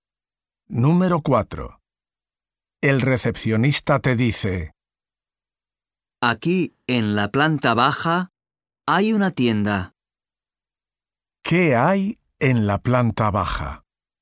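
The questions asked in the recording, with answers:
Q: ¿Qué hay en la planta baja?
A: Una tienda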